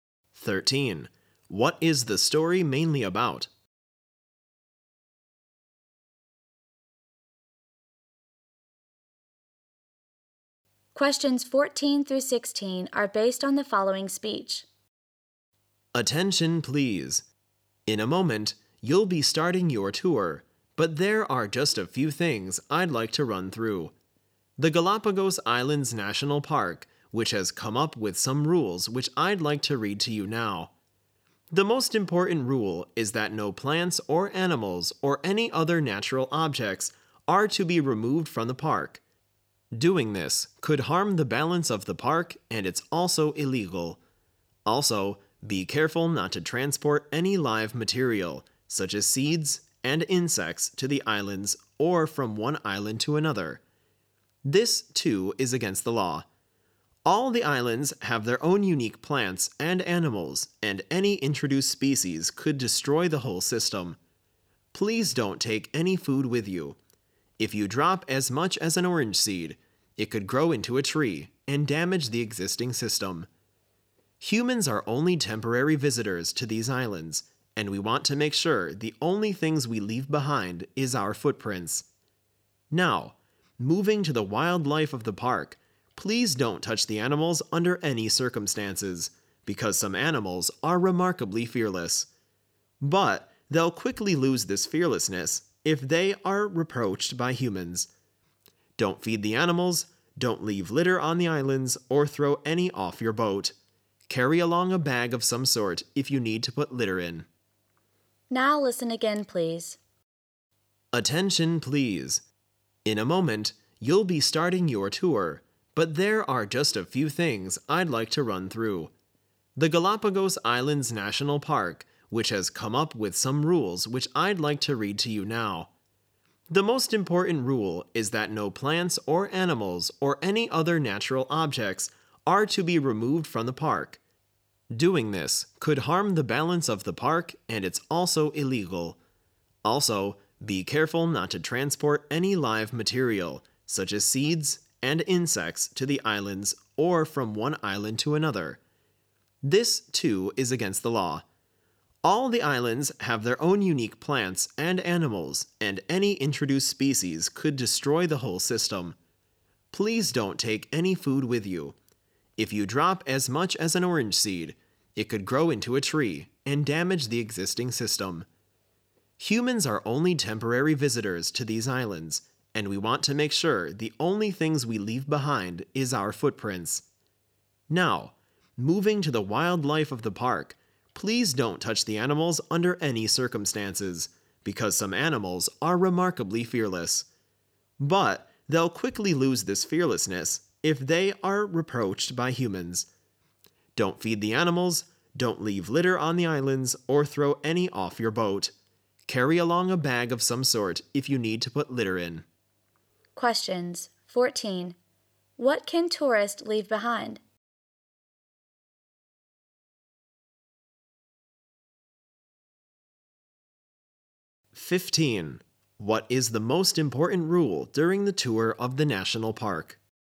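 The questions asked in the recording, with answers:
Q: What can tourists leave behind?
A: Only their footprints

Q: What is the most important rule during the tour of the national park?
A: No plants, animals or natural objects may be removed from the park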